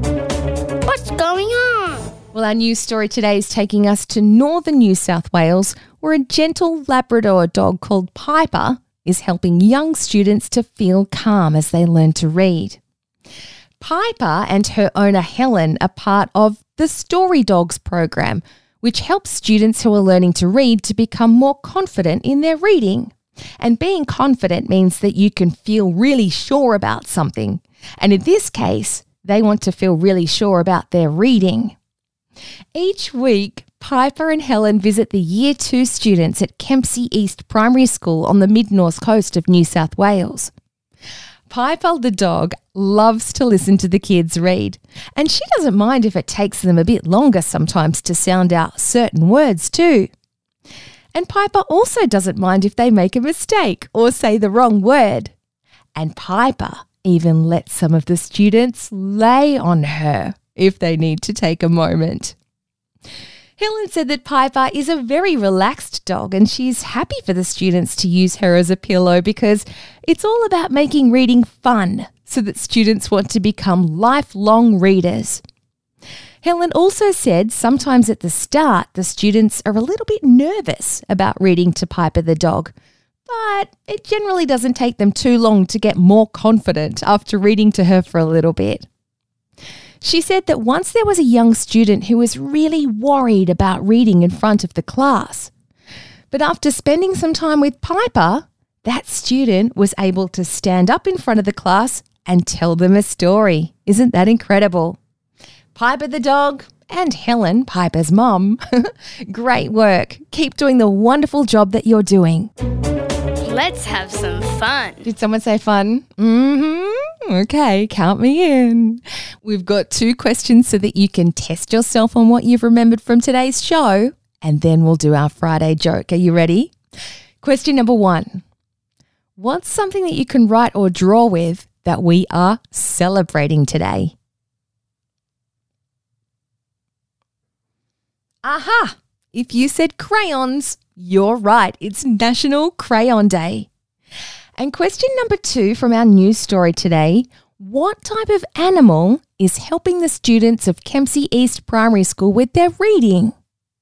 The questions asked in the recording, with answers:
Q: what type of animal is helping the students of Kempsey East Primary School with their reading?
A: Well, if you answered dog or Piper or Piper the dog, you've got it right.